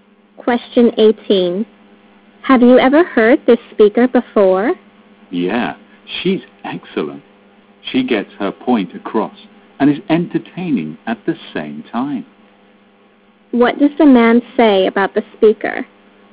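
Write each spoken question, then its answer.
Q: What does the man say about the speaker?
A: She is excellent: she gets her point across and is entertaining.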